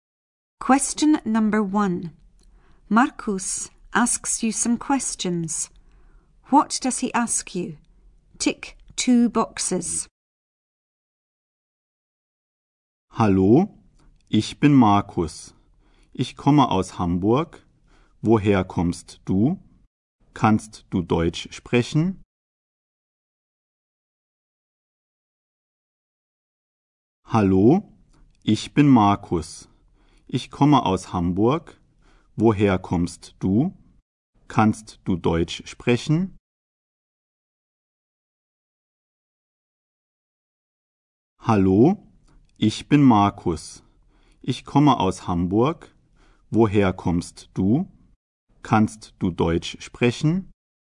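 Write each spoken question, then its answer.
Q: What does he ask you? Tick two boxes.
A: Where you come from and whether you can speak German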